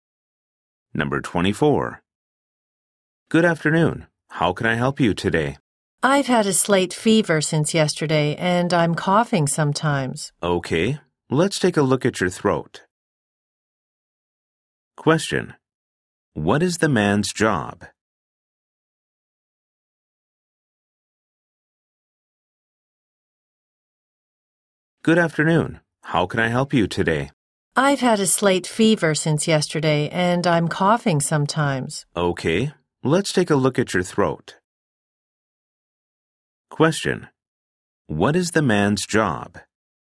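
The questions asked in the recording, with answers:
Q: What is the man's job?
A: A doctor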